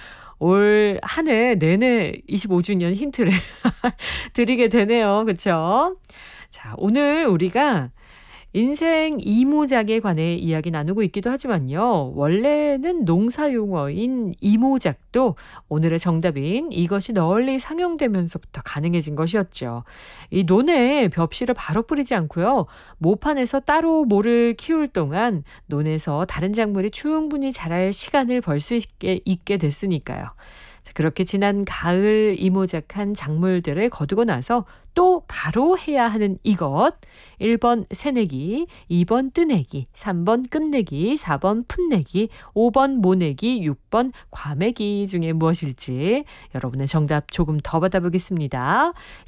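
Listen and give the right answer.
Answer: 5번: 모내기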